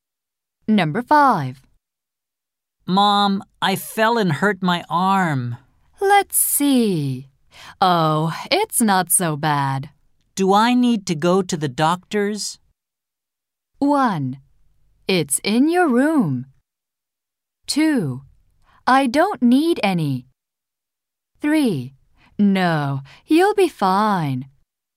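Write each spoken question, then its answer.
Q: Do I need to go to the doctor's?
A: 3: No, you'll be fine.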